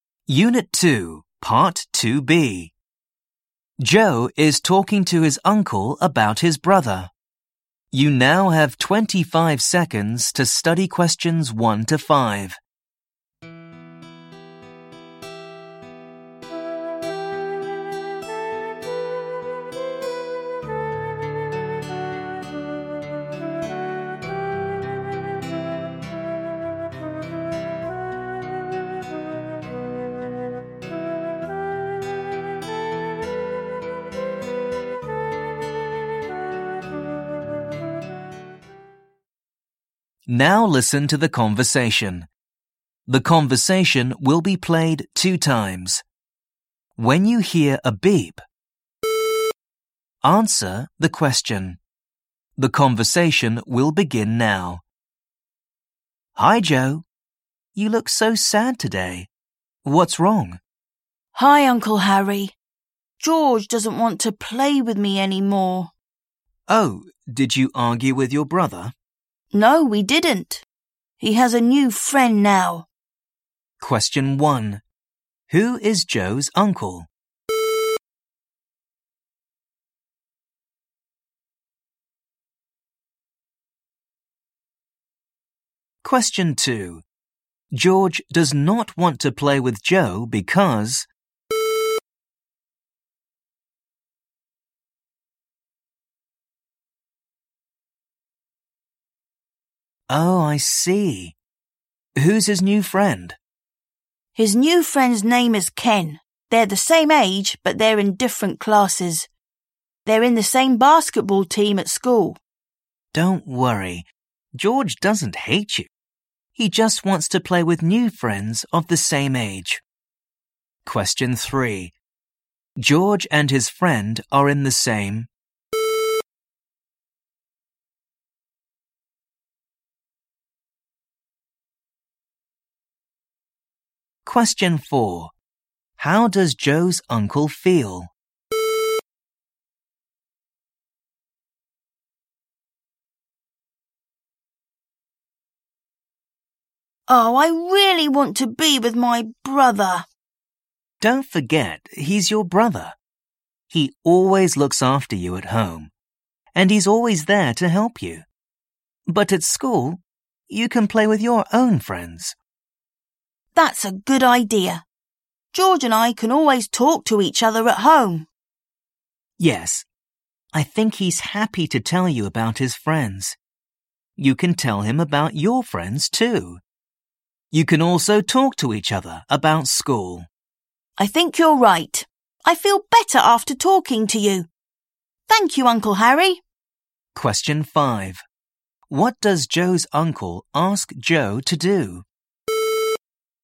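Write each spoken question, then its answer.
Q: Who is Joe's uncle?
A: Harry

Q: George does not want to play with Joe because...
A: he has a new friend

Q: George and his friend are in the same...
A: basketball team at school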